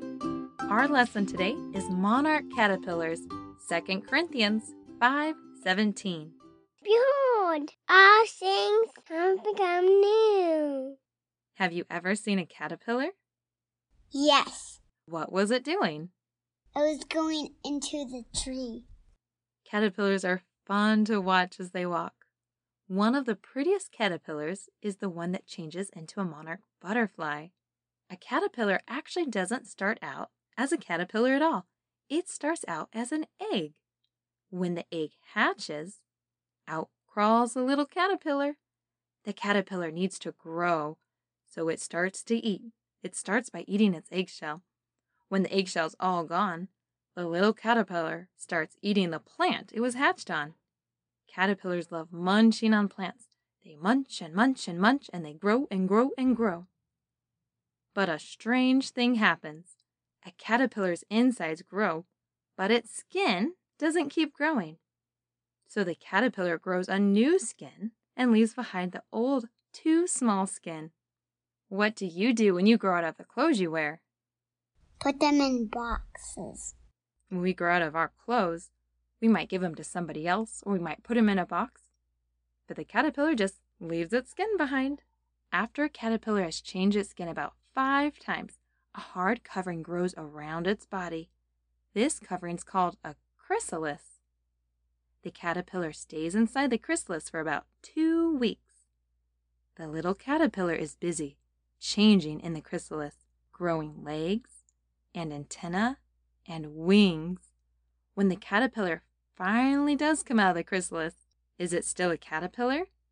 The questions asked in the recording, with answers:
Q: When the caterpillar finally does come out of the chrysalis, is it still a caterpillar?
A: No.